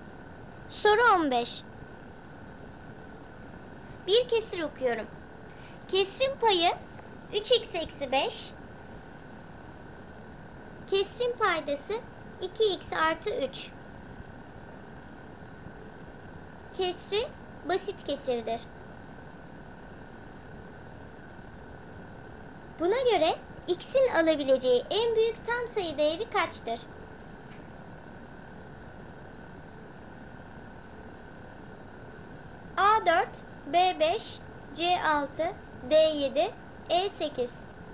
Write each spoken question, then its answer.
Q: Buna göre x'in alabileceği en büyük tam sayı değeri kaçtır?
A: Doğru cevap D 7.